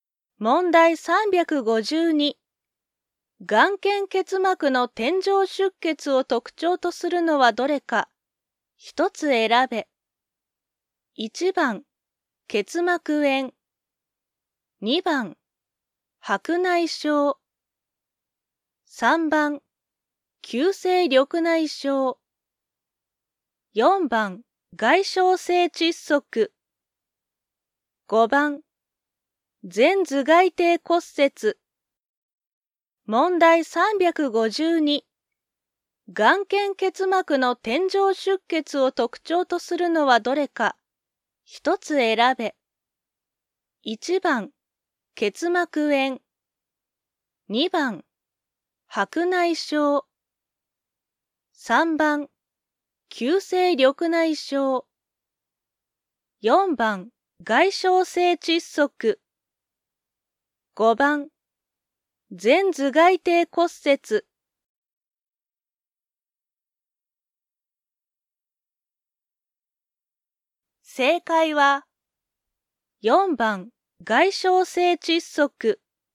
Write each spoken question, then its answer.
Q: 眼瞼結膜の点状出血を特徴とするのはどれか。1つ選べ。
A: 正解は、4番、外傷性窒息。